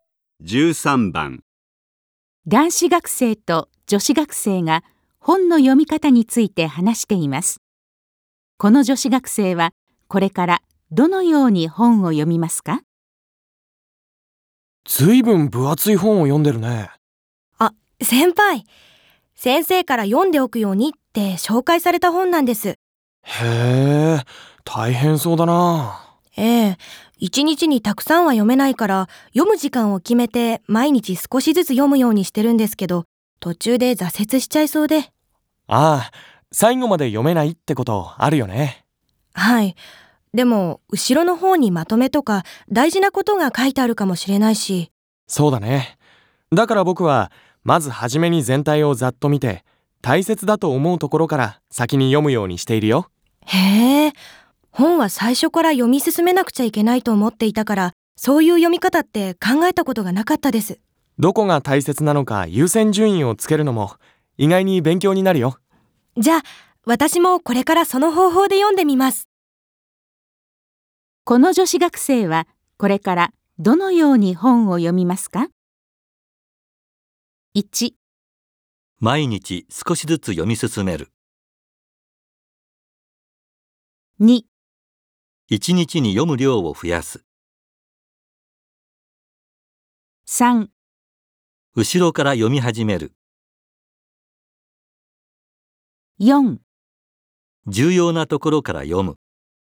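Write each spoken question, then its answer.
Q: この女子学生はこれからどのように本を読みますか?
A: 4: 重要なところから読む。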